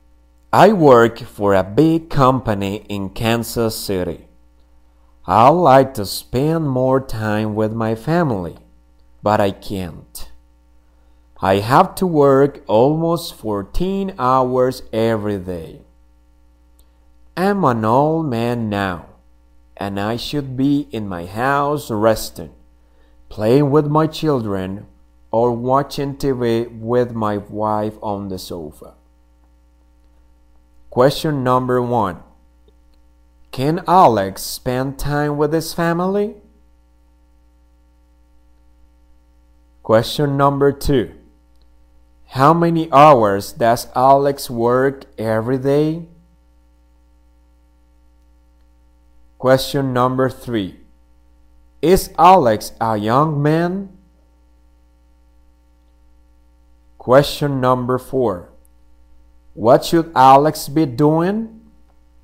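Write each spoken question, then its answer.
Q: Can Alex spend time with his family?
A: No, he can't

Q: How many hours does Alex work every day?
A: Almost 14 hours

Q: Is Alex a young man?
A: No, he's an old man

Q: What should Alex be doing?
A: Resting at home, playing with his children, or watching TV with his wife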